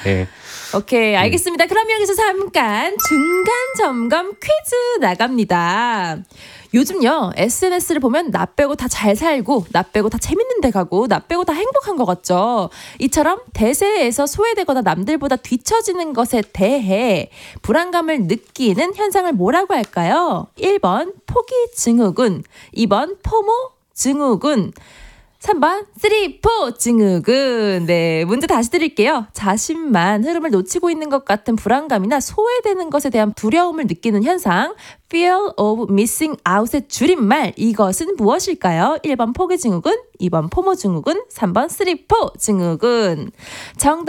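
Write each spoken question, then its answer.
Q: 이처럼 대세에서 소외되거나 남들보다 뒤처지는 것에 대해 불안감을 느끼는 현상을 뭐라고 할까요?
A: 2번: 포모 증후군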